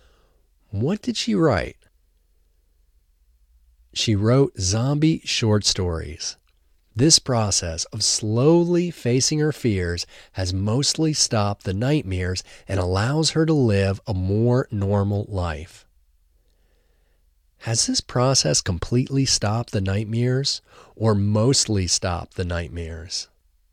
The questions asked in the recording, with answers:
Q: Has this process completely stopped the nightmares or mostly stopped the nightmares?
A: This process has mostly stopped the nightmares.